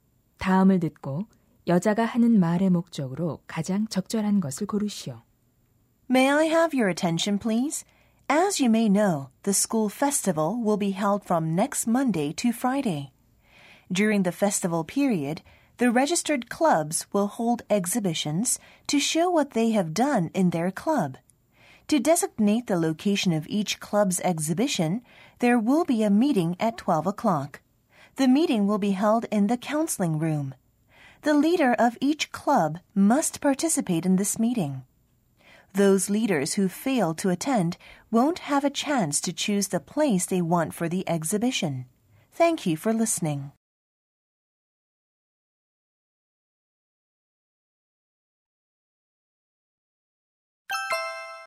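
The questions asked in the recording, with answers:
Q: 다음을 듣고 여자가 하는 말의 목적으로 가장 적절한 것을 고르시오.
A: 축제 전시 장소를 정하는 동아리 대표 회의 참석을 알리려고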